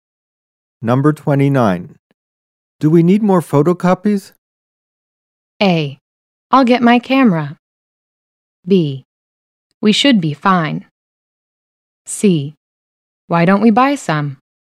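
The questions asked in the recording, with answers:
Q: Do we need more photocopies?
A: B: We should be fine.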